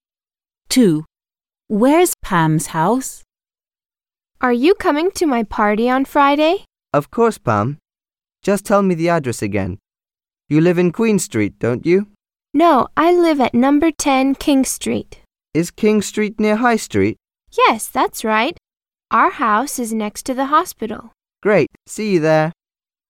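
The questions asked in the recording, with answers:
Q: Where's Pam's house?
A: number 10 King Street, next to the hospital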